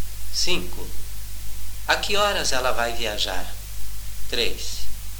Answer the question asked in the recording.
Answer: Ela vai viajar às 3.